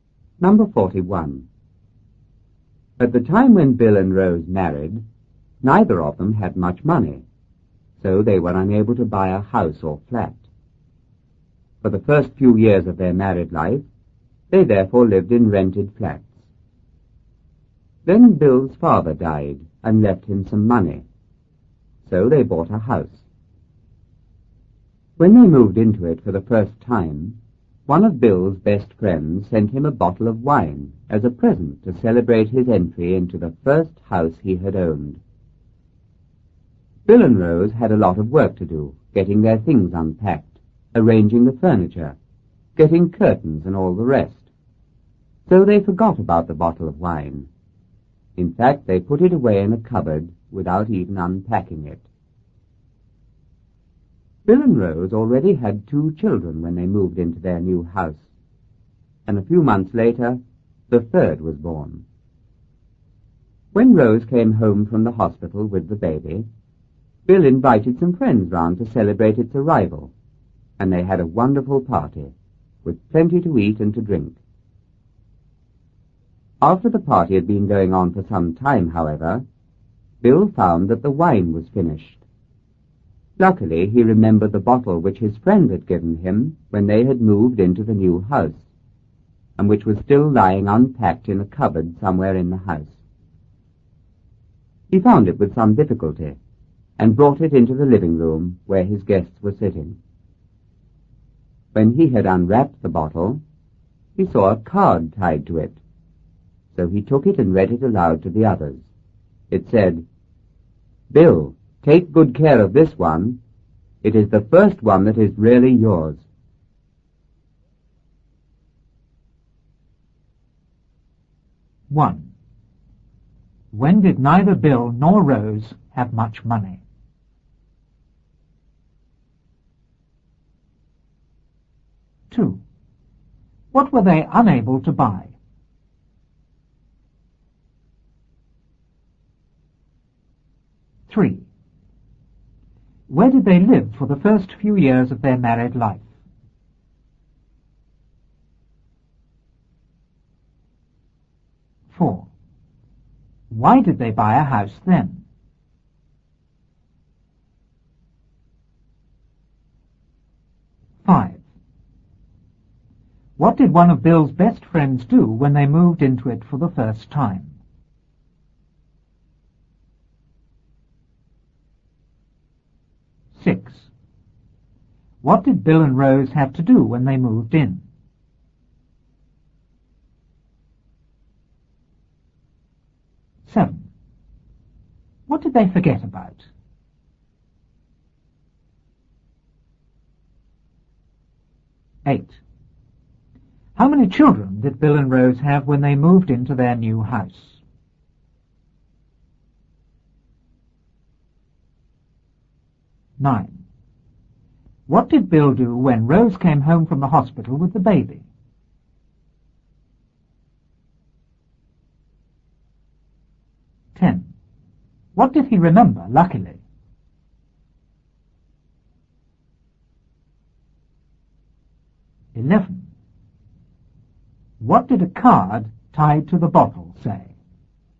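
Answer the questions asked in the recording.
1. When they married
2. A house or flat
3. In rented flats
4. Bill's father died and left him some money
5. He sent Bill a bottle of wine as a present
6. Unpack their things, arrange the furniture, get curtains and so on
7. The bottle of wine
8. Two
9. He invited some friends round to celebrate
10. The bottle his friend had given him, still unpacked in a cupboard
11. Bill, take good care of this one. It is the first one that is really yours.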